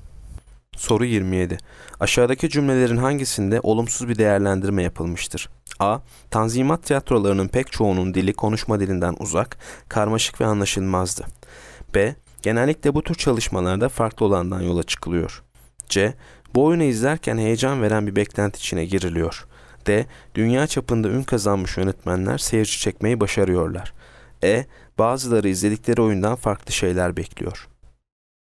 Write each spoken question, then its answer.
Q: Aşağıdaki cümlelerin hangisinde olumsuz bir değerlendirme yapılmıştır?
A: Yanıt A. Tanzimat tiyatrolarının pek çoğunun dili konuşma dilinden uzak, karmaşık ve anlaşılmazdı.